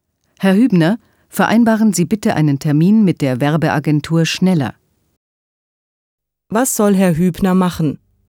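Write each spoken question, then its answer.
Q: Was soll Herr Hübner machen?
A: Einen Termin mit der Werbeagentur vereinbaren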